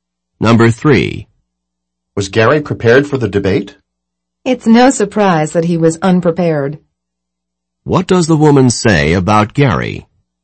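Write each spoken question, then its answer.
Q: What does the woman say about Gary?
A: He was unprepared, as expected.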